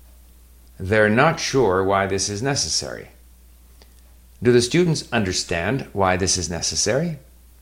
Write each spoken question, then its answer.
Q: Do the students understand why this is necessary?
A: No, they're not sure why this is necessary.